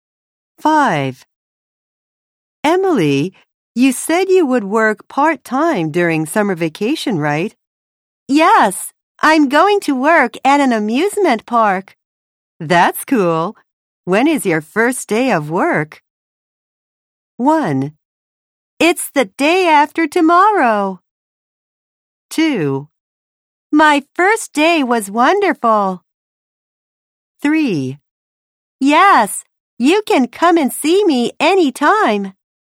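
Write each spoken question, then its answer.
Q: When is your first day of work?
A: 1: It's the day after tomorrow.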